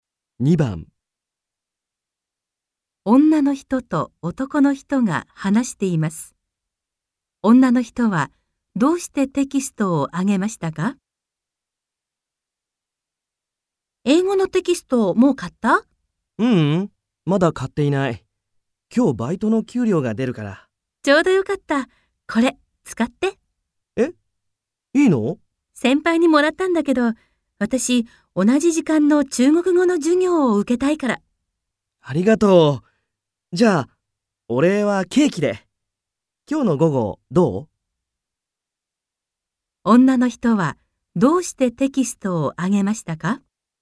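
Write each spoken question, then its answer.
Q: 女の人はどうしてテキストをあげましたか?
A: 同じ時間の中国語の授業を受けたいから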